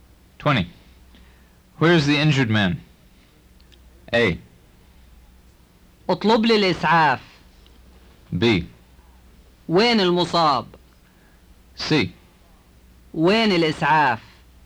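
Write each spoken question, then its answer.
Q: Where is the injured man?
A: B: وين المصاب؟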